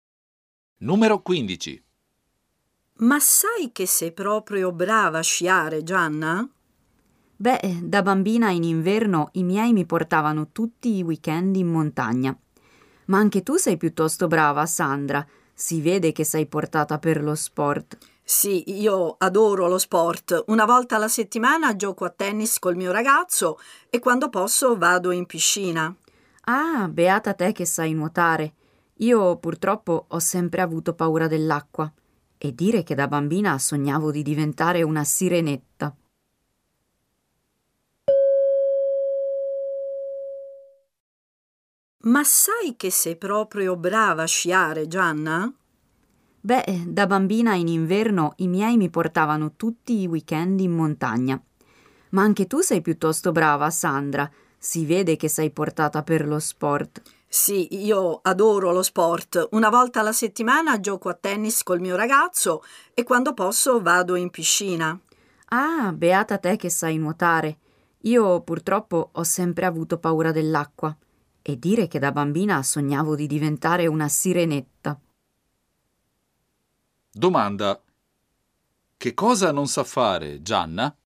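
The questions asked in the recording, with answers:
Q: Domanda. Che cosa non sa fare Gianna?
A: Nuotare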